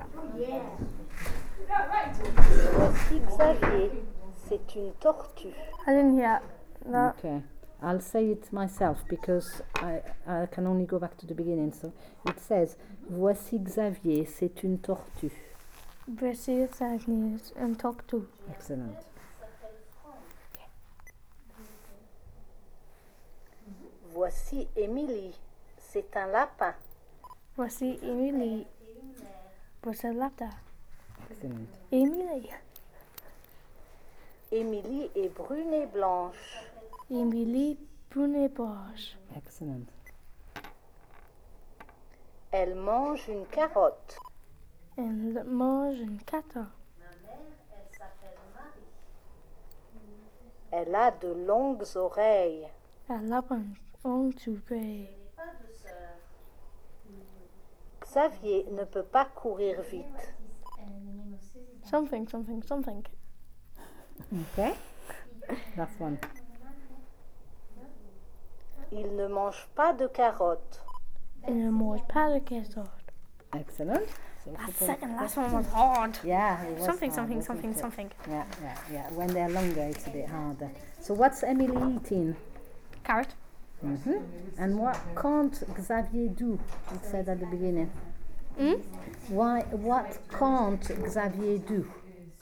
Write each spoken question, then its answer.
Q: What can't Xavier do?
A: Run.